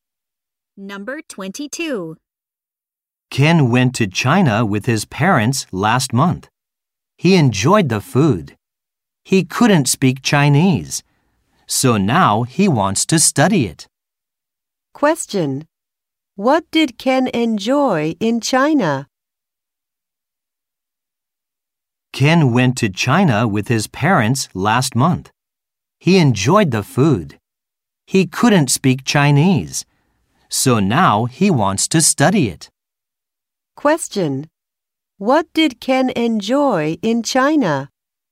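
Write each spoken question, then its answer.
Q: What did Ken enjoy in China?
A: The food.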